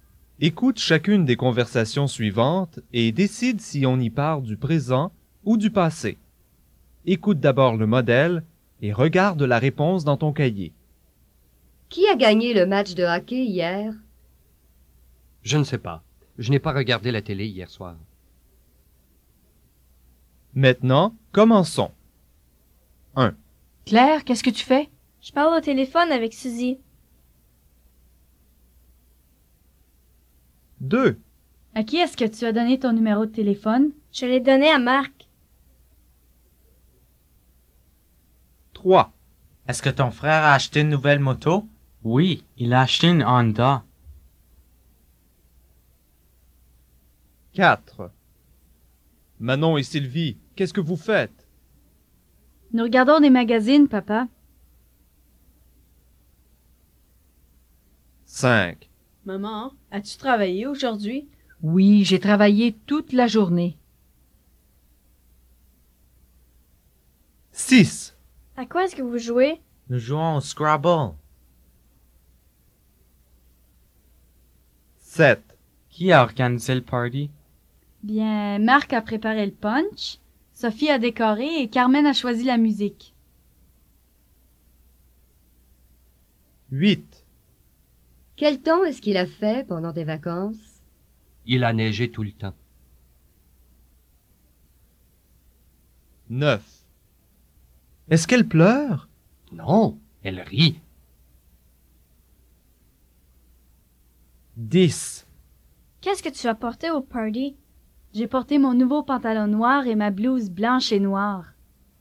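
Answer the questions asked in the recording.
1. présent
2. passé
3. passé
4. présent
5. passé
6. présent
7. passé
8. passé
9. présent
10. passé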